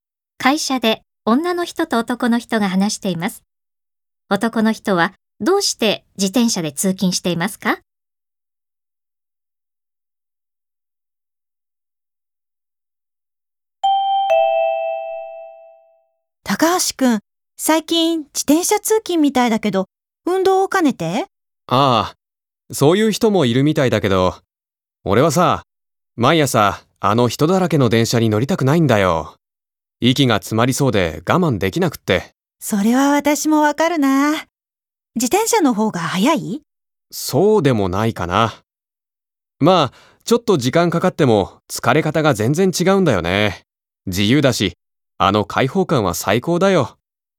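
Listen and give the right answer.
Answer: 人だらけの混んだ電車に乗りたくないから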